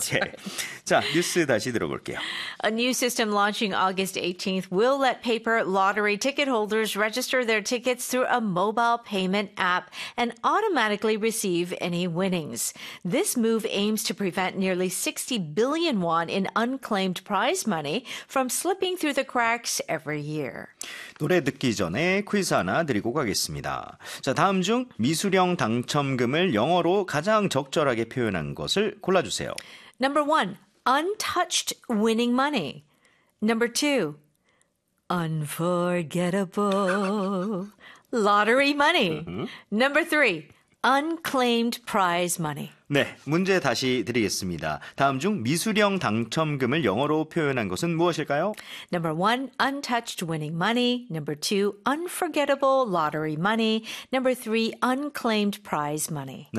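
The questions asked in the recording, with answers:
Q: 다음 중 미수령 당첨금을 영어로 가장 적절하게 표현한 것을 골라주세요.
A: 3: unclaimed prize money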